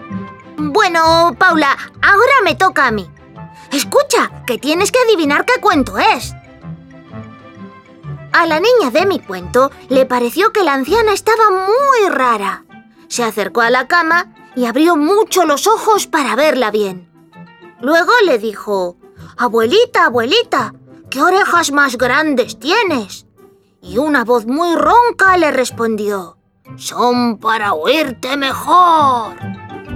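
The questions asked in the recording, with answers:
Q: Escucha, que tienes que adivinar qué cuento es.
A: Caperucita Roja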